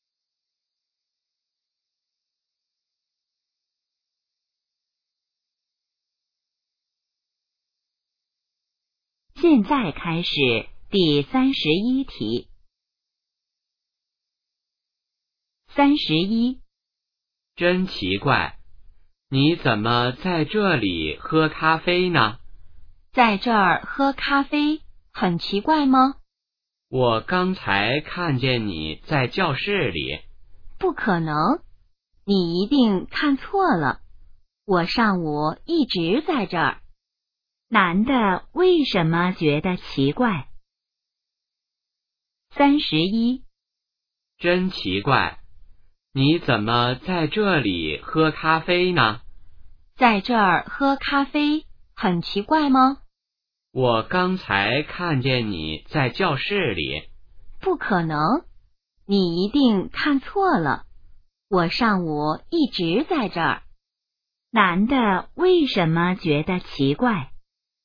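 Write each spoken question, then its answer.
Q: 男的为什么觉得奇怪?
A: 他刚才好像看见女的在教室里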